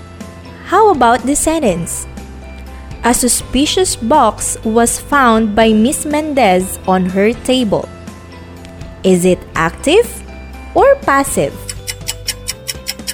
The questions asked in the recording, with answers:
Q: Is it active or passive?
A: Fantastic! It's passive.